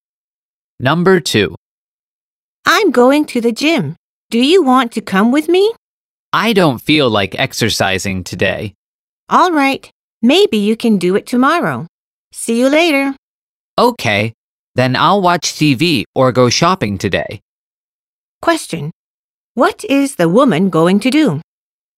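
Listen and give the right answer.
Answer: Watch TV or go shopping.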